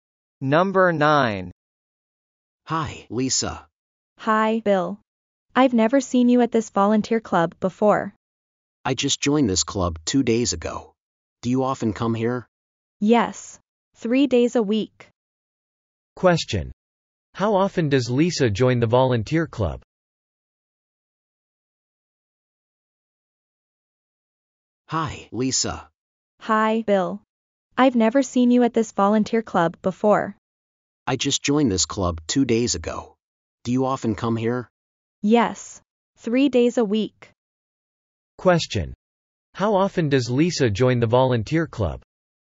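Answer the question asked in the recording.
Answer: Three days a week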